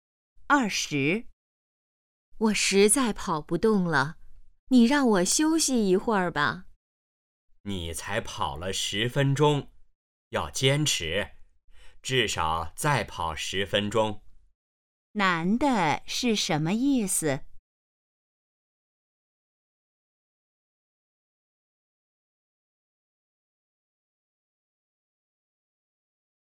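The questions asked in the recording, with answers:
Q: 男的是什么意思?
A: 要坚持,再跑10分钟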